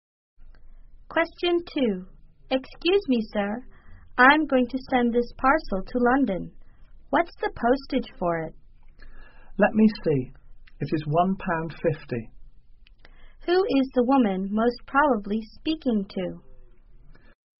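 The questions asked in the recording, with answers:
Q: Who is the woman most probably speaking to?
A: A post office clerk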